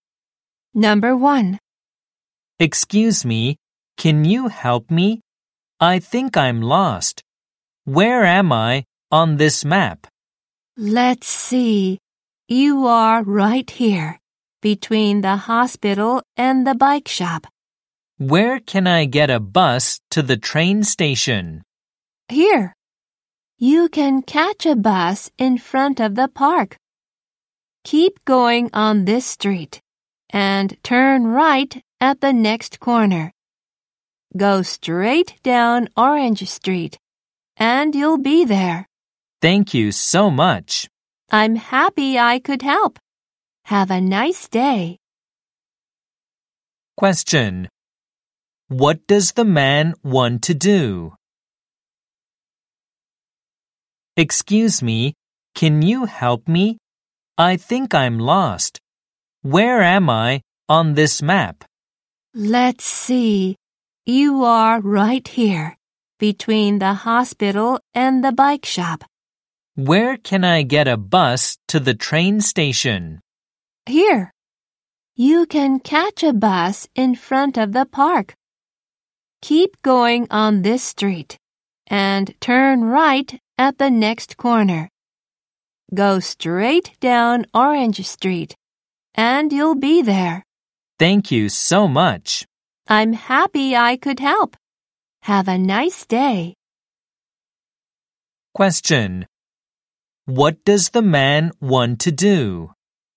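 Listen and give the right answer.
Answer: Take a bus to the train station.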